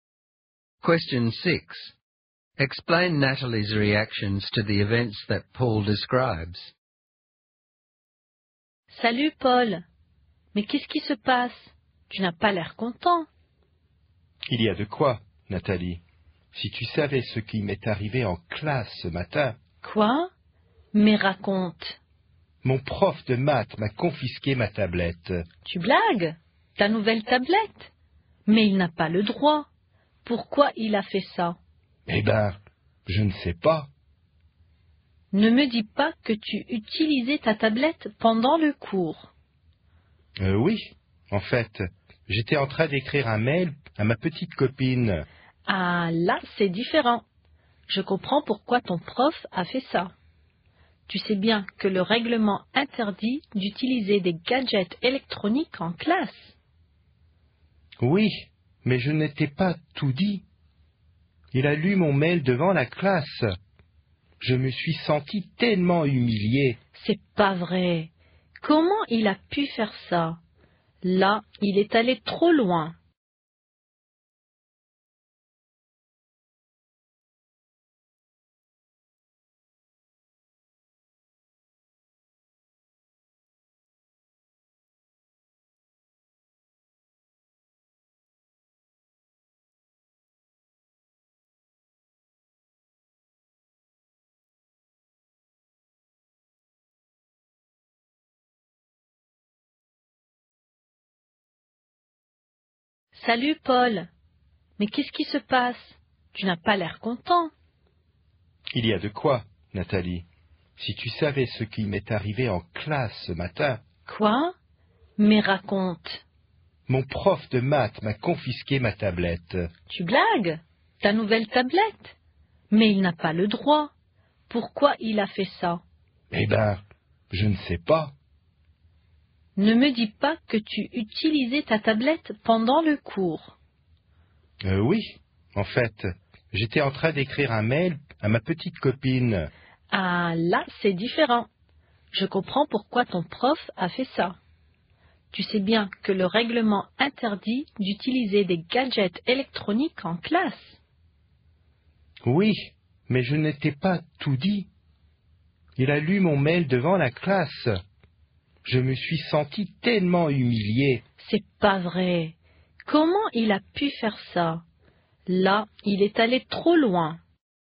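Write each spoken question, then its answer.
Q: Explain Natalie's reactions to the events that Paul describes.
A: At first she is shocked and thinks the teacher had no right to take the tablet; once she learns Paul was emailing in class, she understands because the rules forbid it; but she is outraged that the teacher read the email aloud, saying he went too far.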